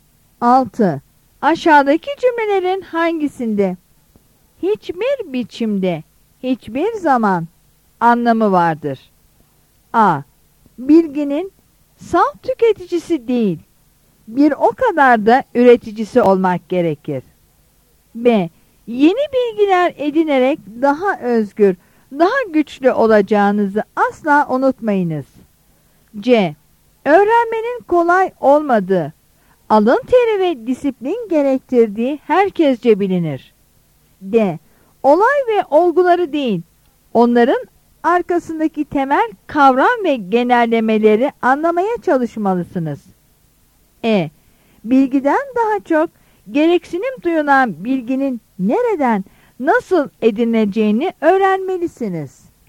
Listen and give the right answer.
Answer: Yanıt B'dir.